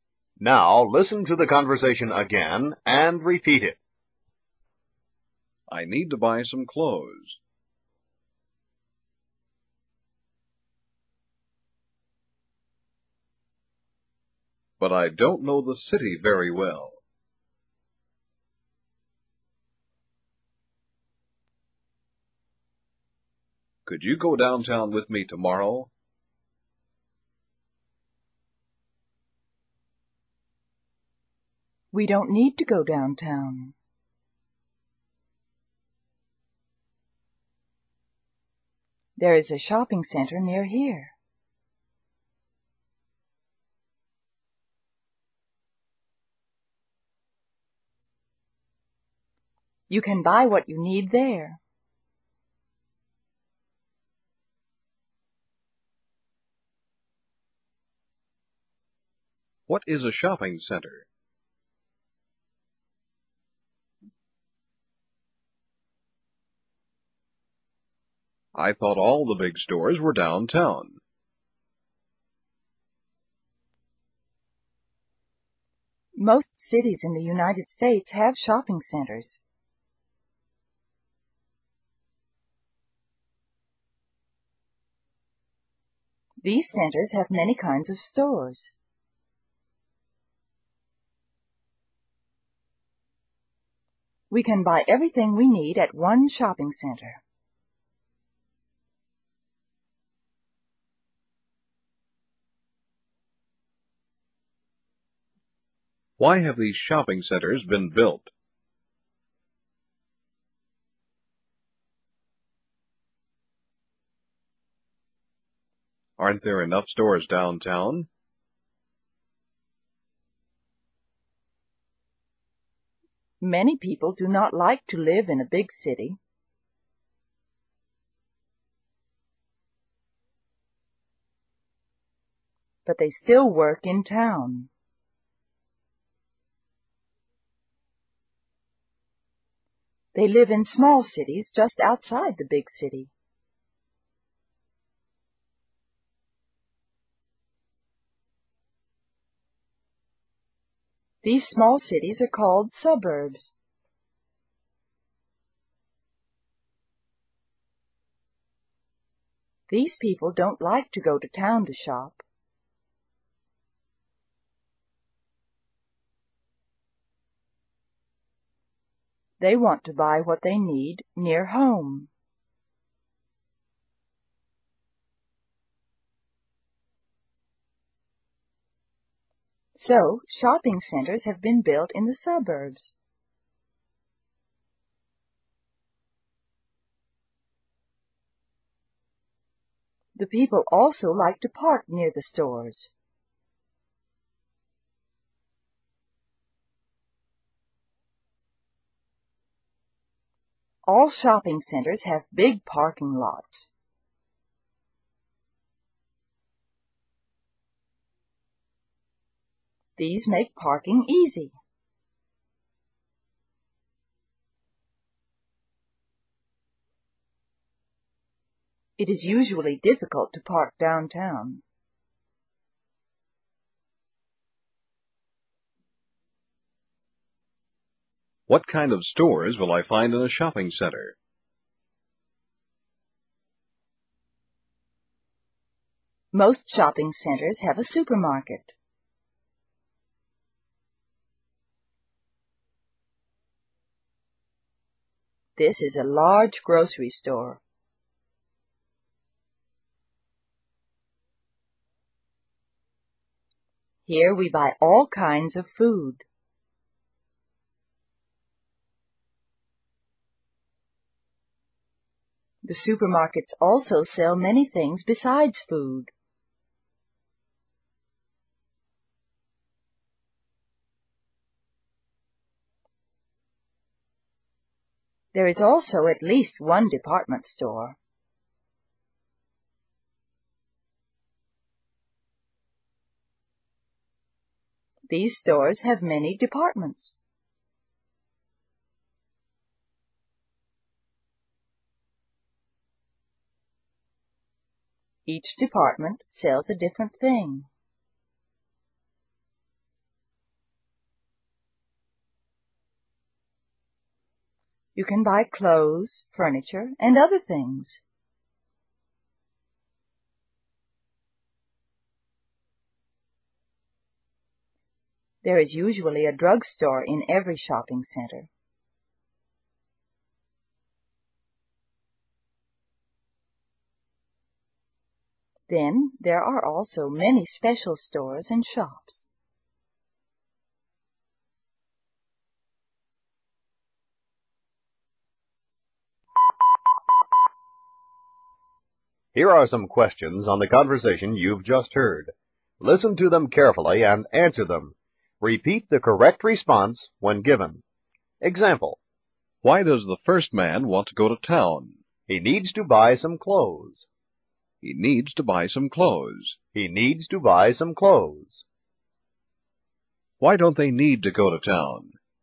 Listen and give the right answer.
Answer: There is a shopping center near them.